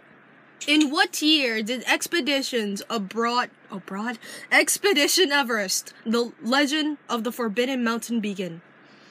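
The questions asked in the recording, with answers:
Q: Expedition Everest, the Legend of the Forbidden Mountain begin?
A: 2006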